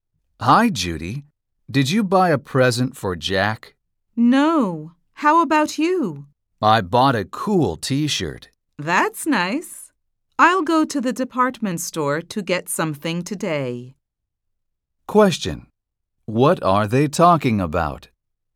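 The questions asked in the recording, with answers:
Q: What are they talking about?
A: A present for Jack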